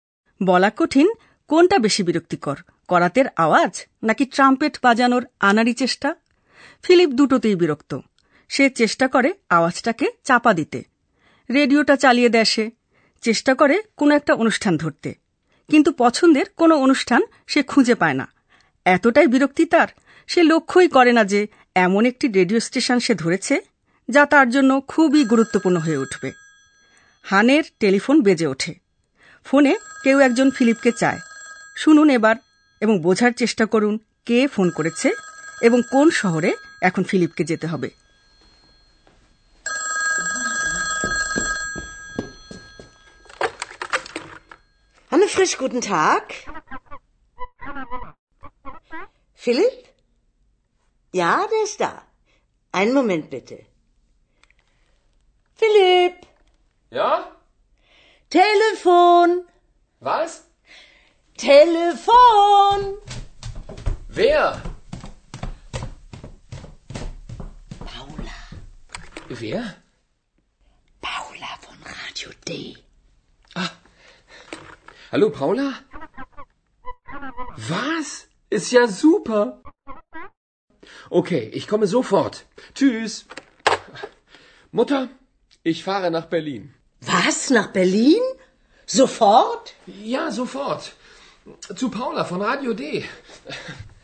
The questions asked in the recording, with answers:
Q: শুনুন এবার এবং বোঝার চেষ্টা করুন কে ফোন করেছে এবং কোন শহরে এখন ফিলিপকে যেতে হবে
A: পাওলা নামের একটি মেয়ে ফোন করেছে সে radio ডি বেতার কেন্দ্রে কাজ করে ফিলিপকে এখন Berlin যেতে হবে